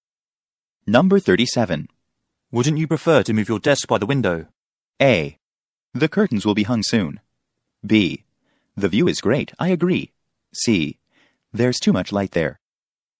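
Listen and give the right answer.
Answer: C: There's too much light there.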